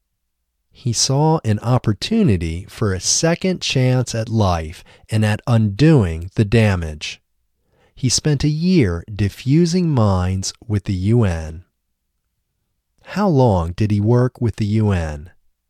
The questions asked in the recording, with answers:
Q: How long did he work with the UN?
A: He worked with the UN for a year.